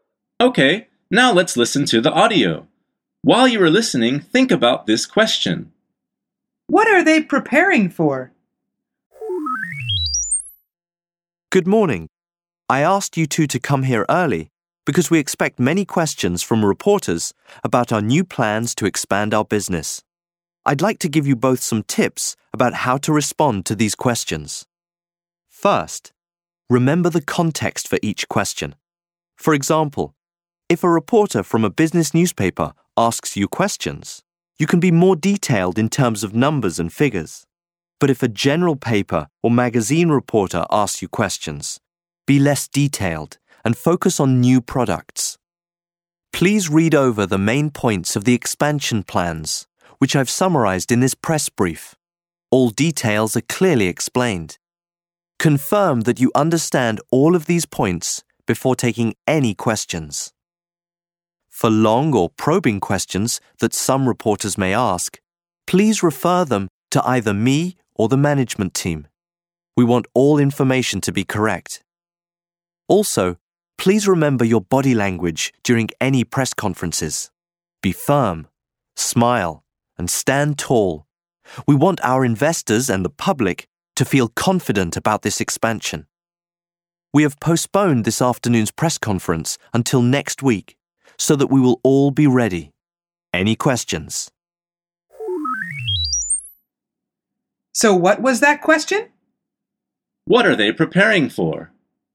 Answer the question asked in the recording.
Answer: The answer is a press conference.